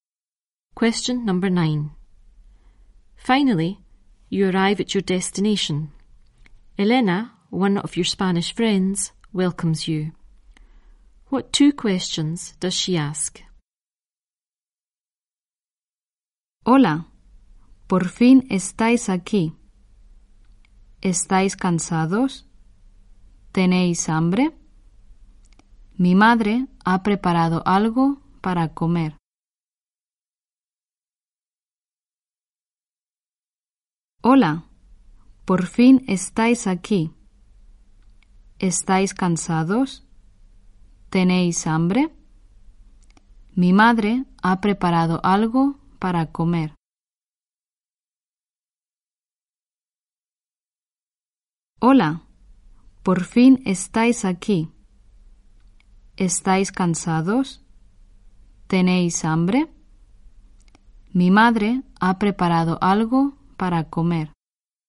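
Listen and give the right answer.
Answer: Are you tired? Are you hungry?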